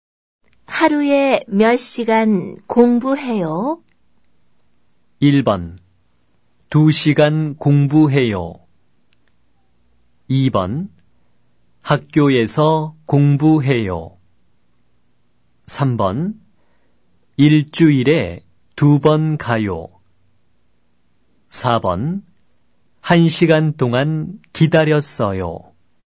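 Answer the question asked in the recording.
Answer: 1번: 2시간 공부해요.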